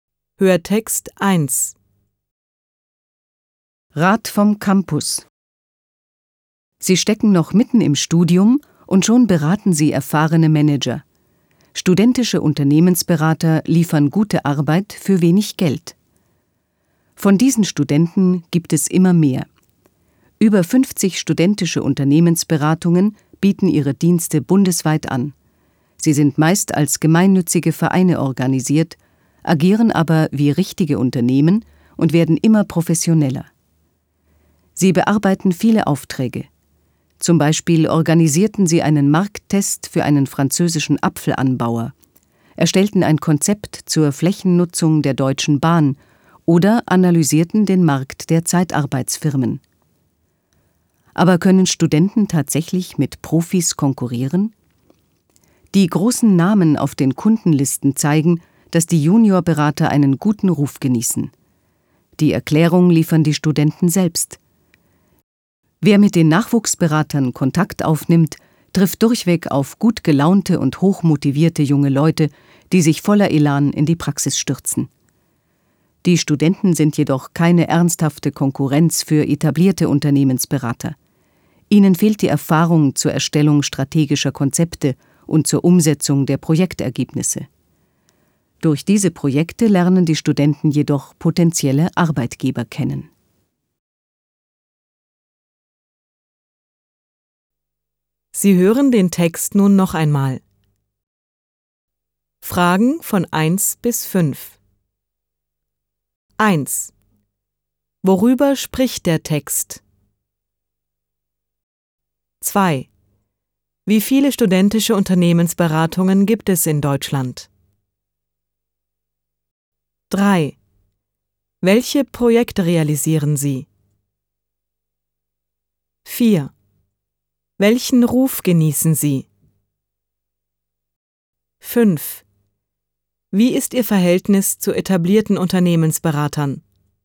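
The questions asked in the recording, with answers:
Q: Worüber spricht der Text?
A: Über studentische Unternehmensberater

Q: Wie viele studentische Unternehmensberatungen gibt es in Deutschland?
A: Über 50

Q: Welche Projekte realisieren Sie?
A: Markttests, Konzepte zur Flächennutzung, Marktanalysen

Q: Welchen Ruf genießen Sie?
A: Einen guten Ruf

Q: Wie ist Ihr Verhältnis zu etablierten Unternehmensberatern?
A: Sie sind keine ernsthafte Konkurrenz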